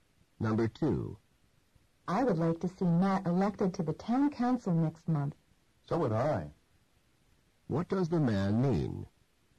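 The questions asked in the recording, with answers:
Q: What does the man mean?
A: He also wants Matt elected.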